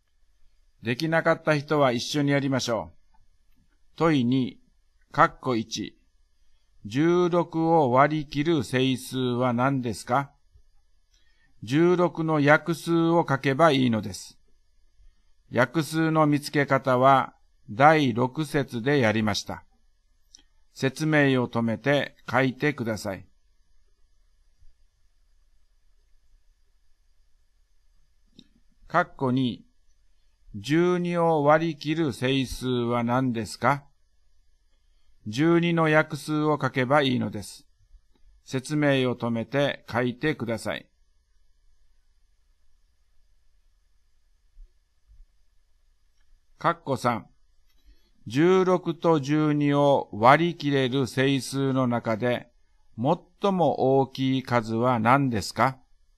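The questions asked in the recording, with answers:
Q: 16を割り切る整数は何ですか?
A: 1、2、4、8、16

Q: 12を割り切る整数は何ですか?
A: 1、2、3、4、6、12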